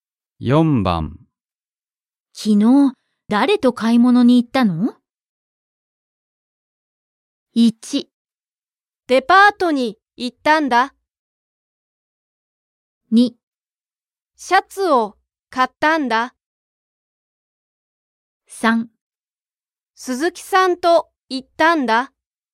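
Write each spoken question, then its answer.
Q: 昨日誰と買い物に行ったの?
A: 3: 鈴木さんと行ったんだ。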